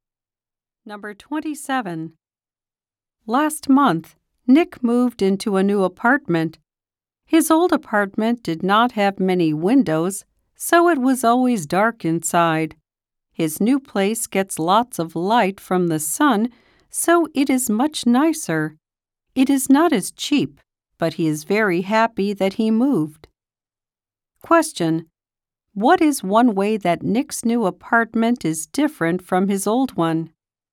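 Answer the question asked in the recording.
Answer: It gets lots of sunlight.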